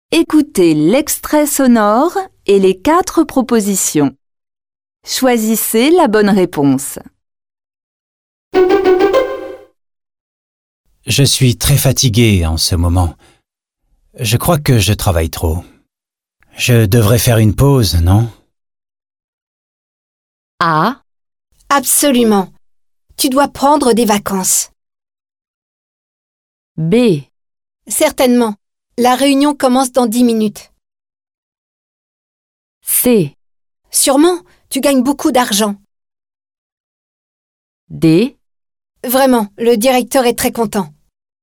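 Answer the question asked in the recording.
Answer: A: Absolument. Tu dois prendre des vacances.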